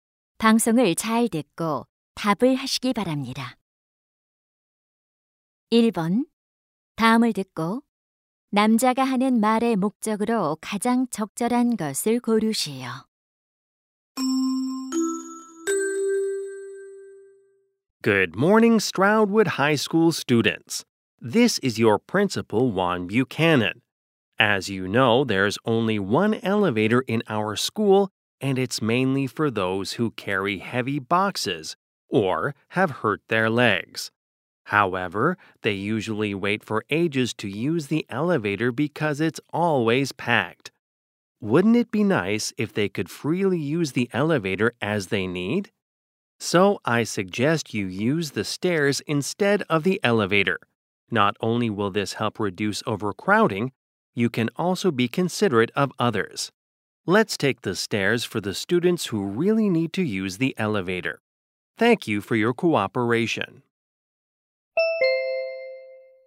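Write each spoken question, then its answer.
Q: 다음을 듣고 남자가 하는 말의 목적으로 가장 적절한 것을 고르시오.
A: 엘리베이터 대신 계단을 이용하도록 권장하려고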